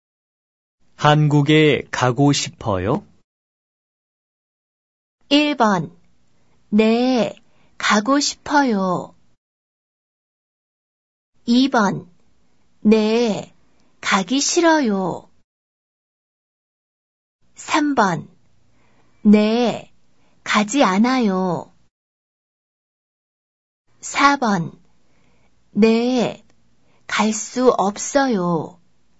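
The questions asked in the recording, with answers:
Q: 한국에 가고 싶어요?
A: 1: 네, 가고 싶어요.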